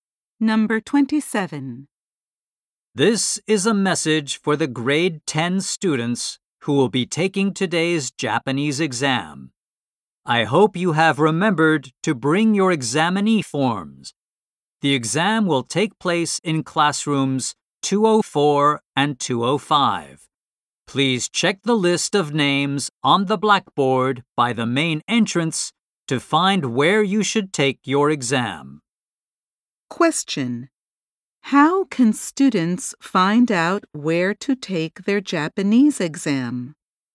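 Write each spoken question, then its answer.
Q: How can students find out where to take their Japanese exam?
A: By checking the list of names on the blackboard by the main entrance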